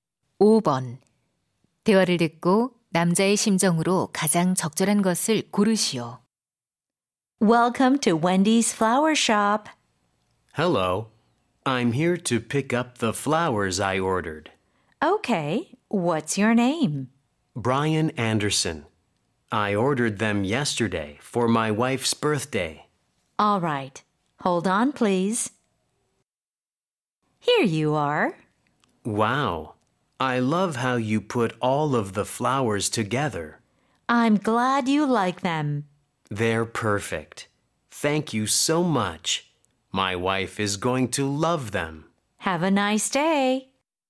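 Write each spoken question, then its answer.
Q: 대화를 듣고 남자의 심정으로 가장 적절한 것을 고르시오.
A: 만족스러운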